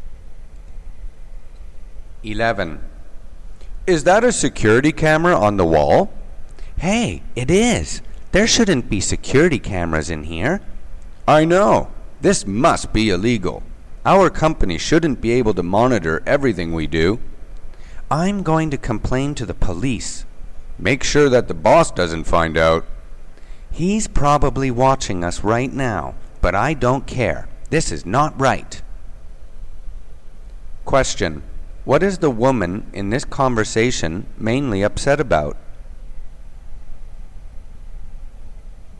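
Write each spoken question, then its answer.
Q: What is the woman in this conversation mainly upset about?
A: The company monitoring employees with a security camera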